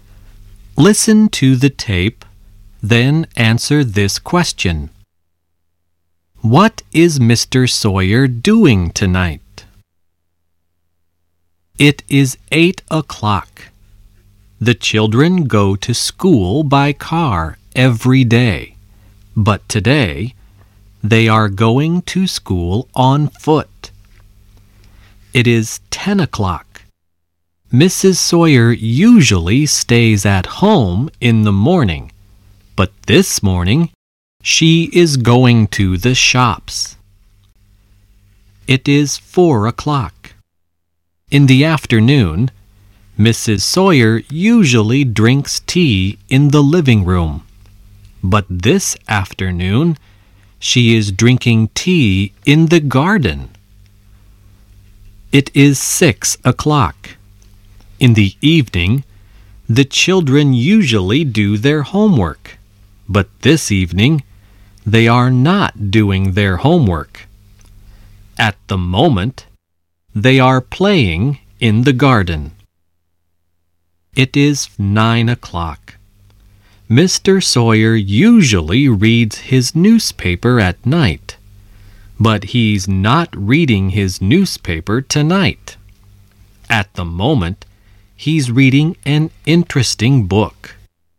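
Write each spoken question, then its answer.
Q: What is Mr. Sawyer doing tonight?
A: He's reading an interesting book.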